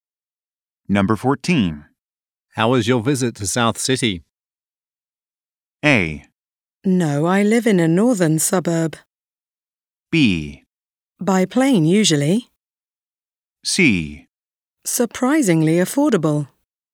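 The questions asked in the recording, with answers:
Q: How was your visit to South City?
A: C: Surprisingly affordable.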